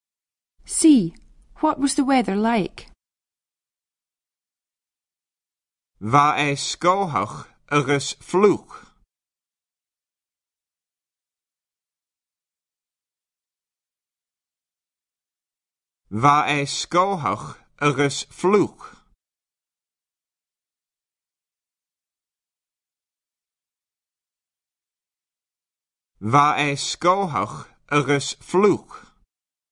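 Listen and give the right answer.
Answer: cloudy and wet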